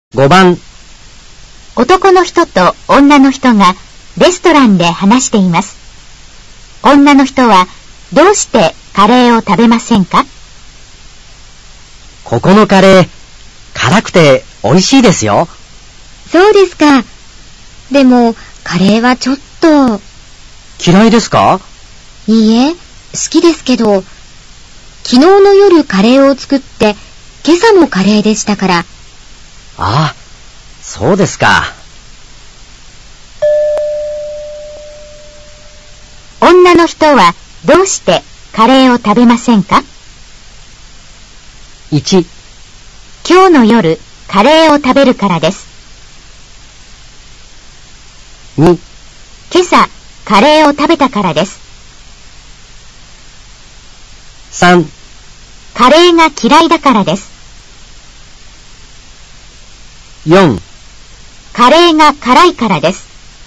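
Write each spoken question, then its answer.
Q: 女の人はどうしてカレーを食べませんか?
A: 2: 今朝カレーを食べたからです。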